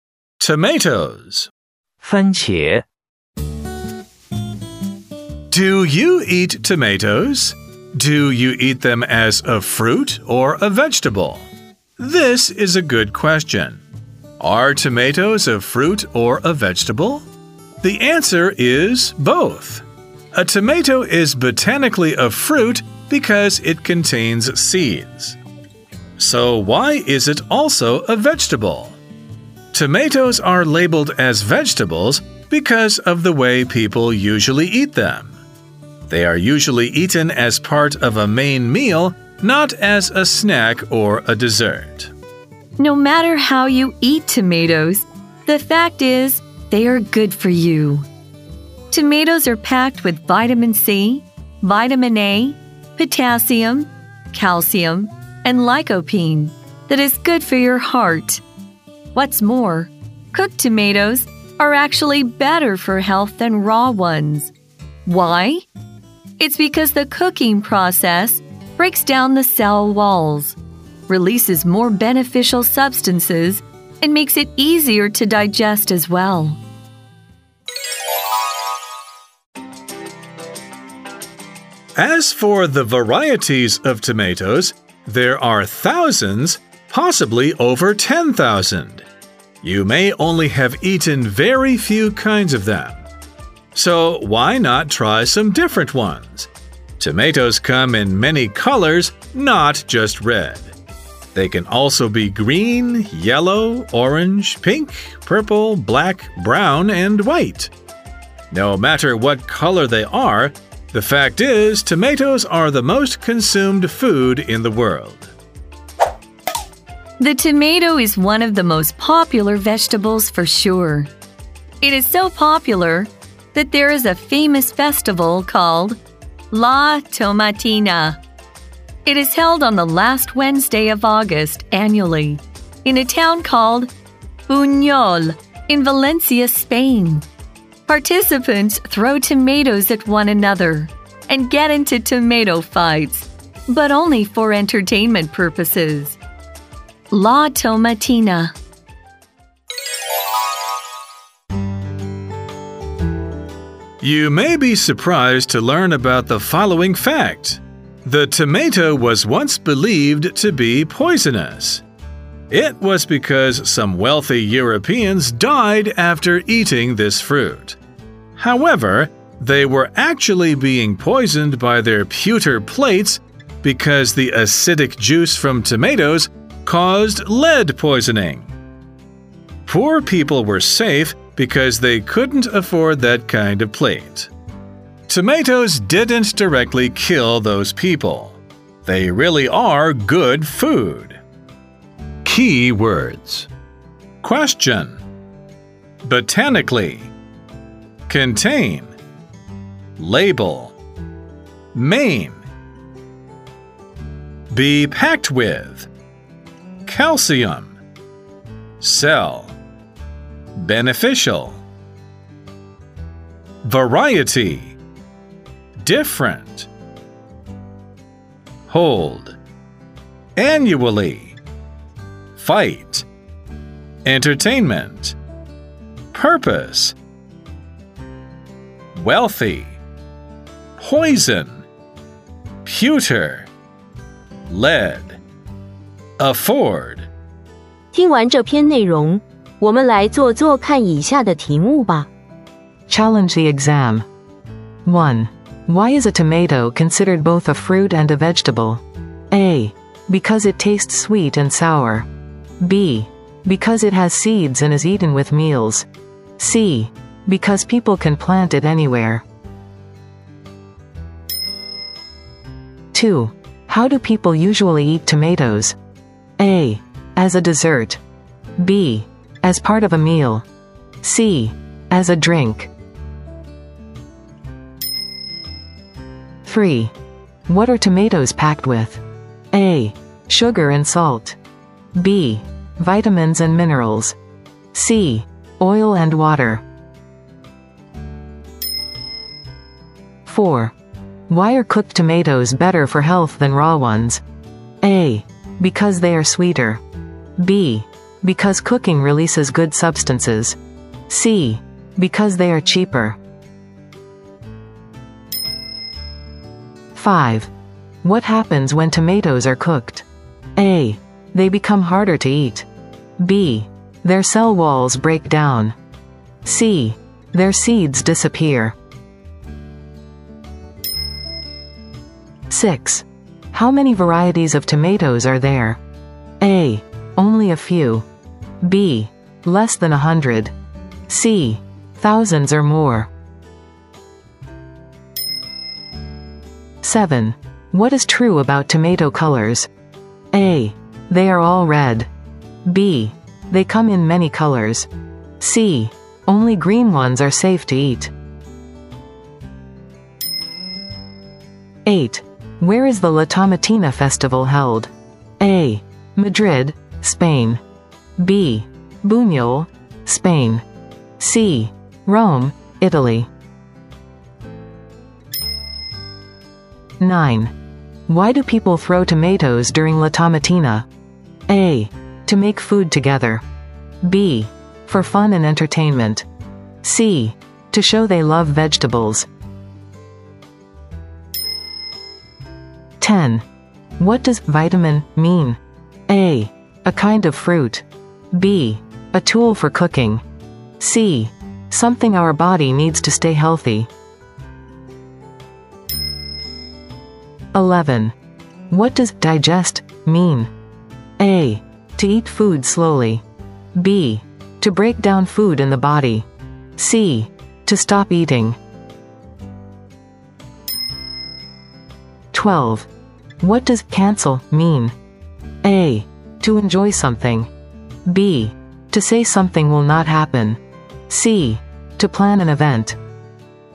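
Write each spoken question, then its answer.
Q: Why is a tomato considered both a fruit and a vegetable?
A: B: Because it has seeds and is eaten with meals.

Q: How do people usually eat tomatoes?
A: B: As part of a meal.

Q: What are tomatoes packed with?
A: B: Vitamins and minerals.

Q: Why are cooked tomatoes better for health than raw ones?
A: B: Because cooking releases good substances.

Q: What happens when tomatoes are cooked?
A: B: Their cell walls break down.

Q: How many varieties of tomatoes are there?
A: C: Thousands or more.

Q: What is true about tomato colors?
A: B: They come in many colors.

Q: Where is the La Tomatina Festival held?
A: B: Buñol, Spain.

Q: Why do people throw tomatoes during La Tomatina?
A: B: For fun and entertainment.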